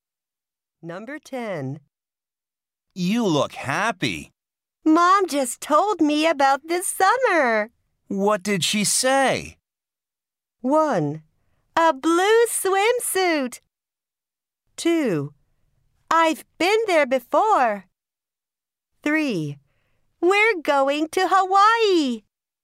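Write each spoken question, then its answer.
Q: What did she say?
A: 3: We're going to Hawaii.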